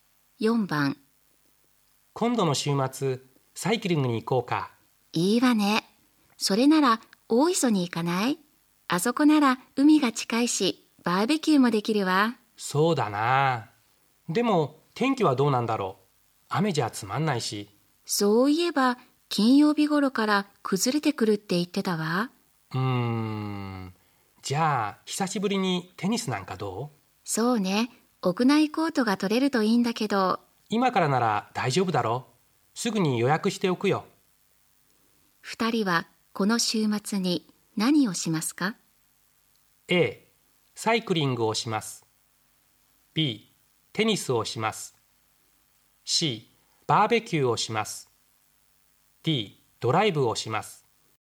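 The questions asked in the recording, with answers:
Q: 2人はこの週末に何をしますか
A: B: テニスをします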